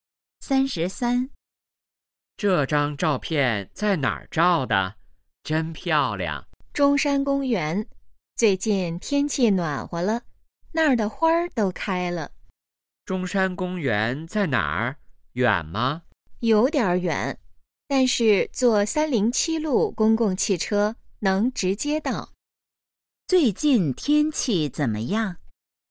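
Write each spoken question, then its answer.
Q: 最近天气怎么样?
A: 暖和了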